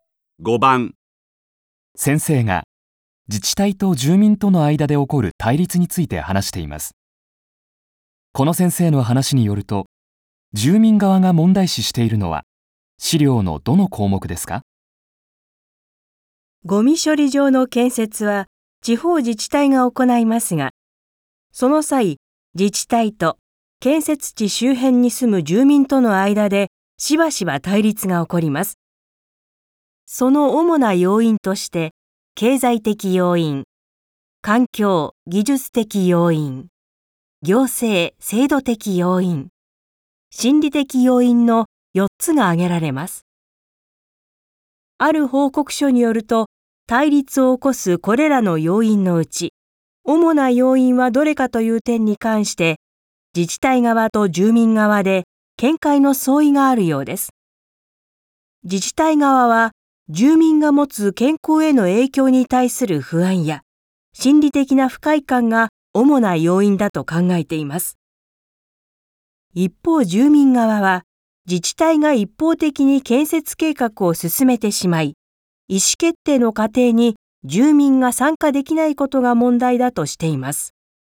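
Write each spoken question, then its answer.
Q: この先生の話によると、住民側が問題視しているのは資料のどの項目ですか?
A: 行政・制度的要因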